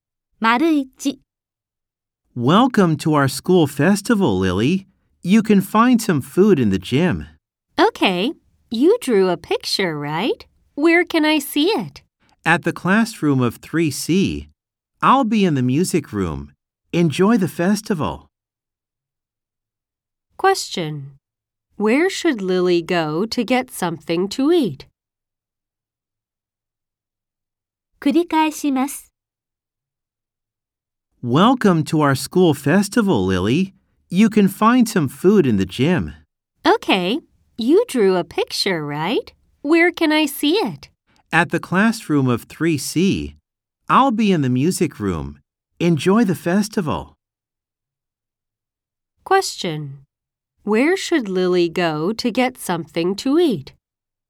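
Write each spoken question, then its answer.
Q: Where should Lily go to get something to eat?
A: To the gym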